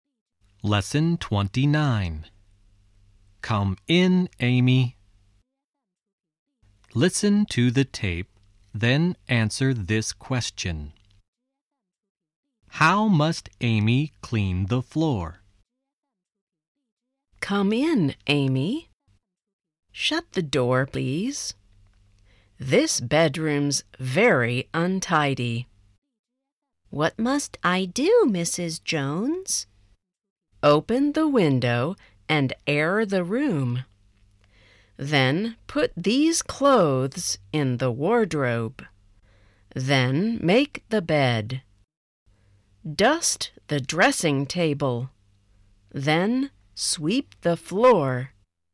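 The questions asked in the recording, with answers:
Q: How must Amy clean the floor?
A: She must sweep it.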